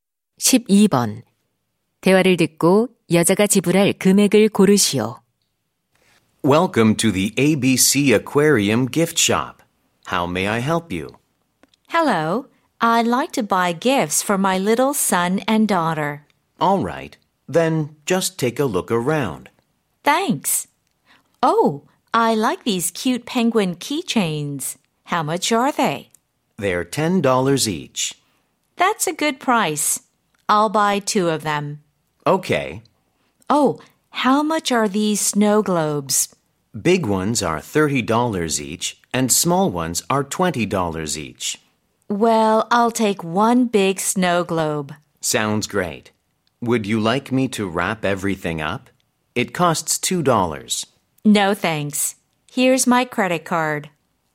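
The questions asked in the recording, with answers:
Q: 대화를 듣고 여자가 지불할 금액을 고르시오.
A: $50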